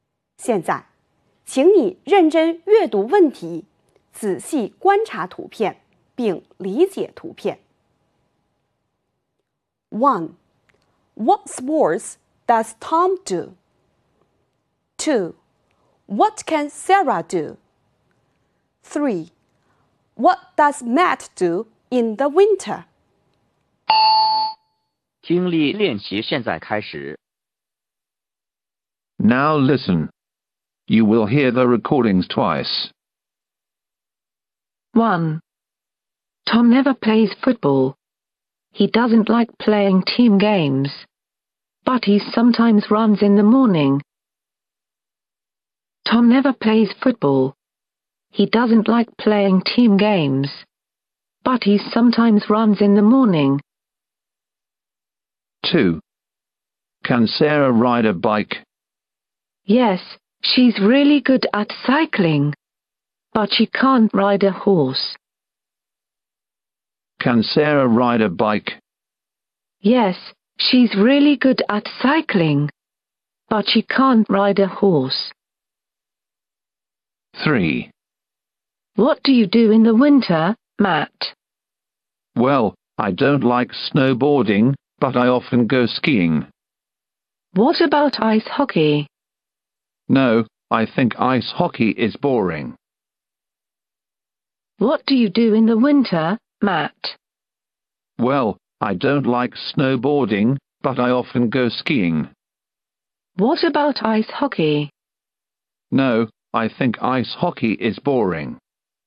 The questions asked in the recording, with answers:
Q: What sports does Tom do?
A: 第一题,选择 C, 关键信息是 ran。

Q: What can Sarah do?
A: 第二题,选择 A, 关键信息是 ride a bike。

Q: What does Matt do in the winter?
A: 第三题,选择 B, 关键信息是 go skiing。